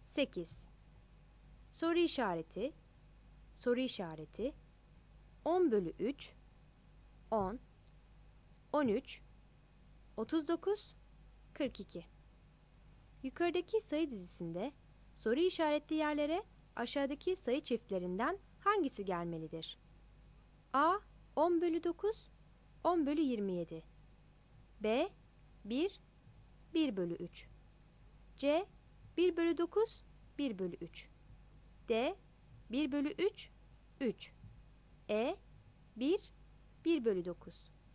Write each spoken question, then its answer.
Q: Yukarıdaki sayı dizisinde soru işaretli yerlere aşağıdaki sayı çiftlerinden hangisi gelmelidir?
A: Cevap C'dir.